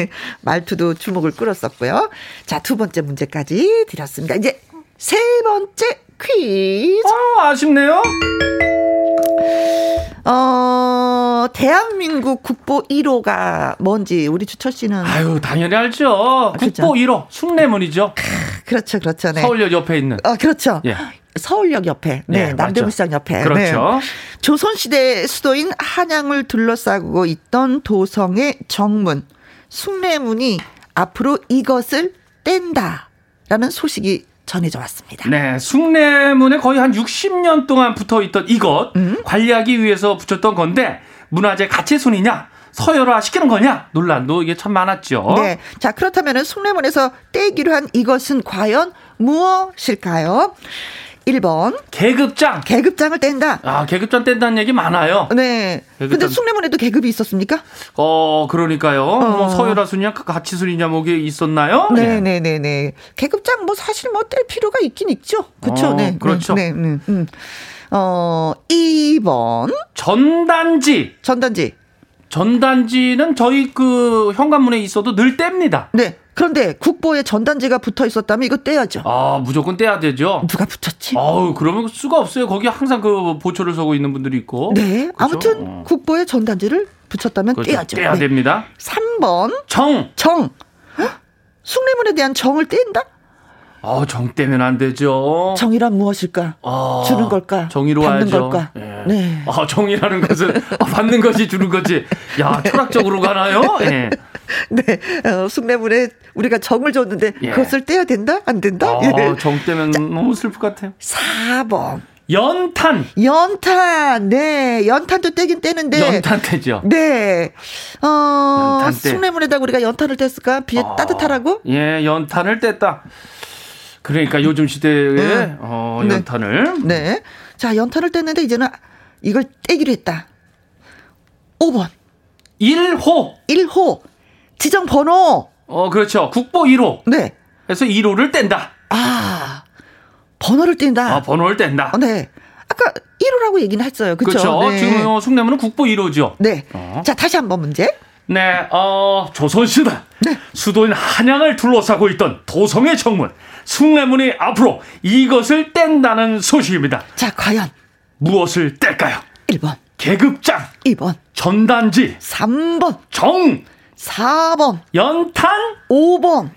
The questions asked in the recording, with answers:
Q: 자, 과연 무엇을 뗄까요?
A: 1호가 정답입니다.